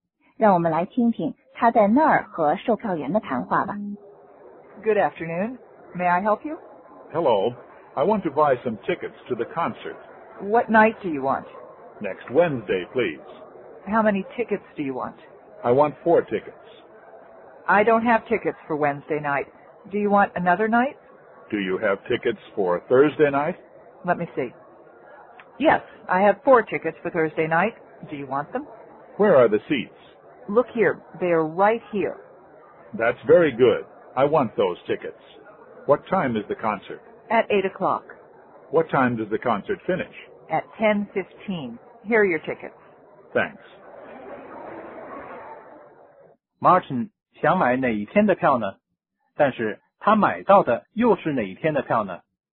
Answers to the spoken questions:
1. 他要买下星期三的票。
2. 他改买星期四的票。